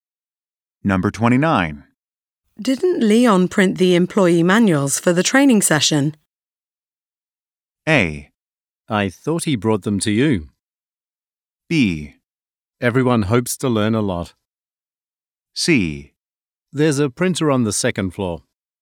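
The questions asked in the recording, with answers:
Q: Didn't Leon print the employee manuals for the training session?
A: A: I thought he brought them to you.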